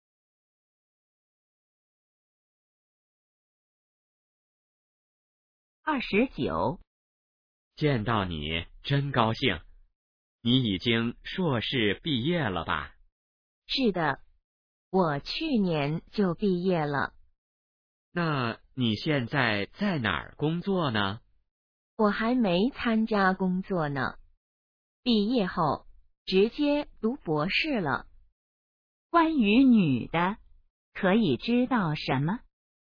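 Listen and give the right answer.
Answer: 在读博士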